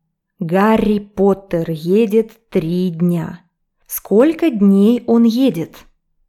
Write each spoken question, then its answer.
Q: Сколько дней он едет?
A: Он едет 3 дня.